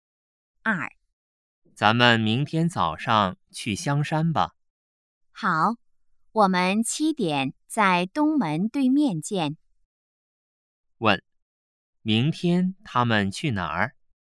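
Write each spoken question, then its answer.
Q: 问,明天他们去哪儿?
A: 香山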